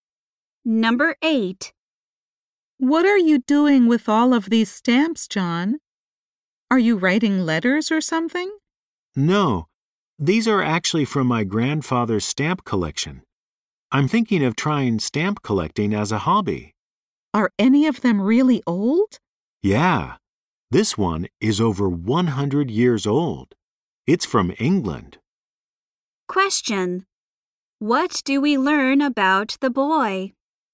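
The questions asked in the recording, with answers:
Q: What do we learn about the boy?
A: He is thinking of taking up stamp collecting as a hobby.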